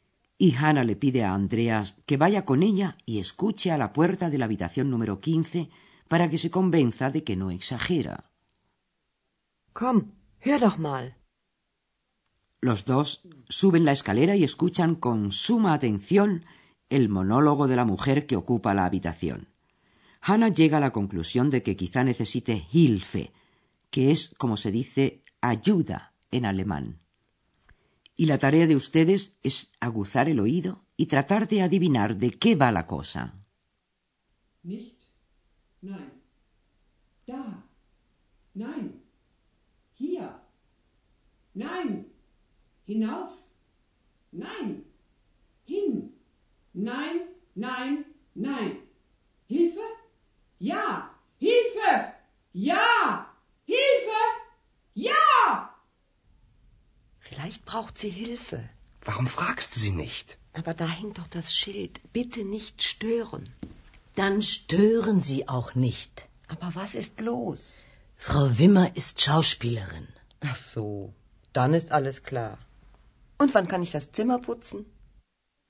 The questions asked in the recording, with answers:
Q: Y la tarea de ustedes es aguzar el oído y tratar de adivinar de qué va la cosa.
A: La señora Wimmer, la ocupante de la habitación, es actriz y está ensayando un papel.